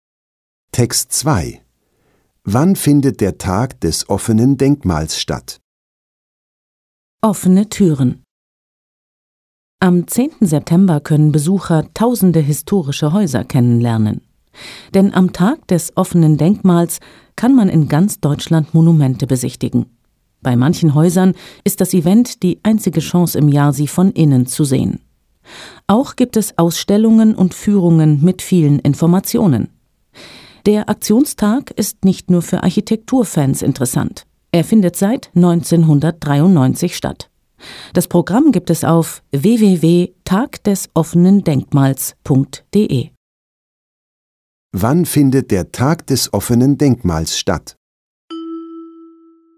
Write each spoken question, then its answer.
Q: Wann findet der Tag des offenen Denkmals statt?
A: Er findet am 10. September statt.